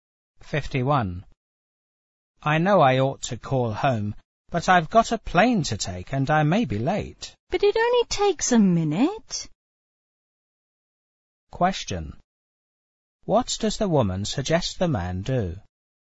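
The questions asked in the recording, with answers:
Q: What does the woman suggest the man do?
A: Call home before leaving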